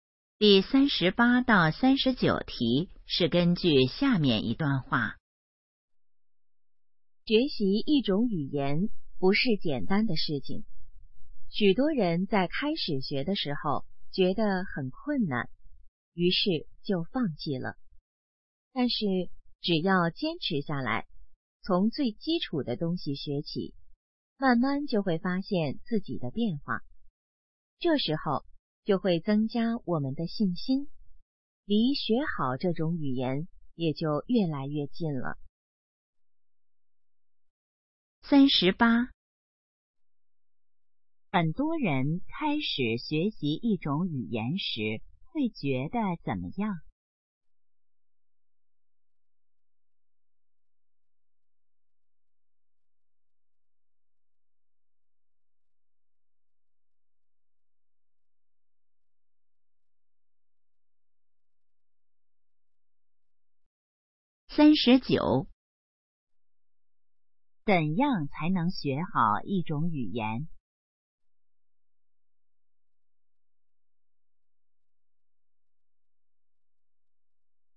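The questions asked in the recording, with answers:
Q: 很多人开始学习一种语言时会觉得怎么样?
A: 很困难

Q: 怎样才能学好一种语言?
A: 坚持下来,从基础学起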